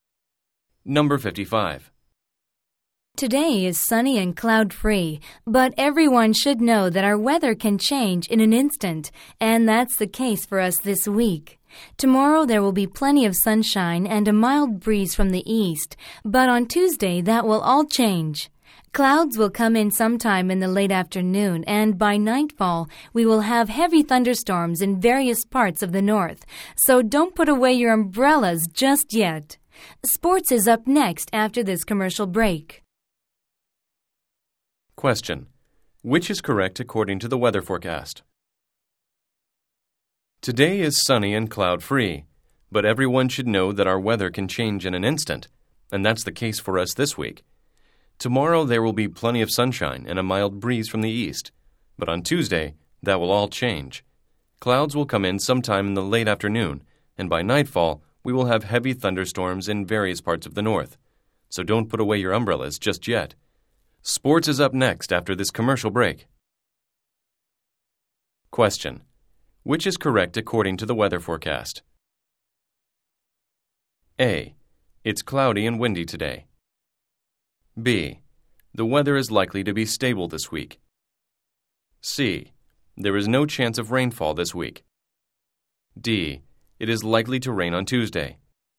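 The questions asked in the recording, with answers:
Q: Which is correct according to the weather forecast?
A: D: It is likely to rain on Tuesday.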